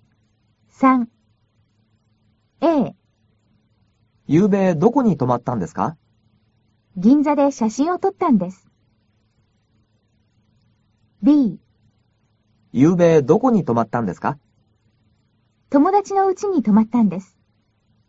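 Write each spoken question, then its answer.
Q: ゆうべどこに泊まったんですか?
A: B: 友達の家に泊まったんです。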